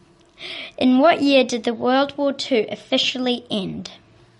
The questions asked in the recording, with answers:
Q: In what year did the World War II officially end?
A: You put 1945, and that is 100% correct.